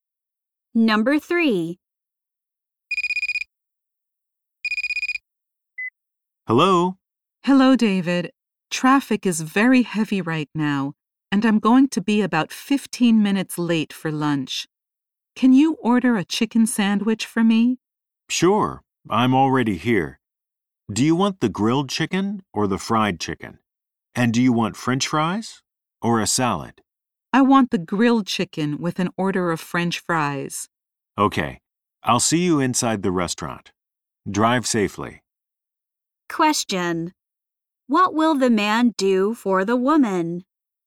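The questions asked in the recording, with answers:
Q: What will the man do for the woman?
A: Order a grilled chicken sandwich with French fries for her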